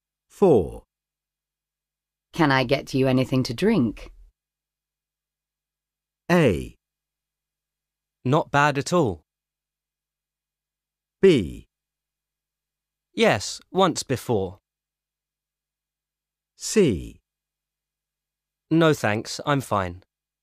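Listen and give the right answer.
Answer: C: No thanks, I'm fine.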